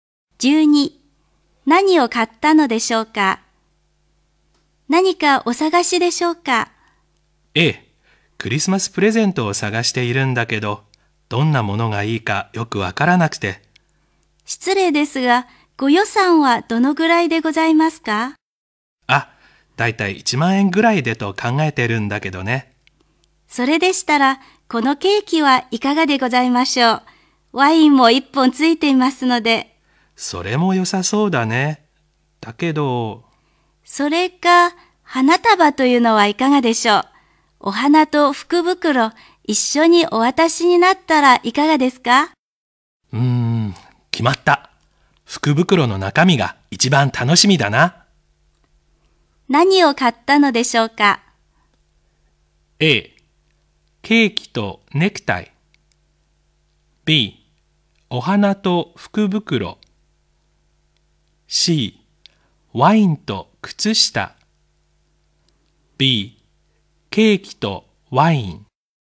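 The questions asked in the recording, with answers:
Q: 何を買ったのでしょうか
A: B: お花と福袋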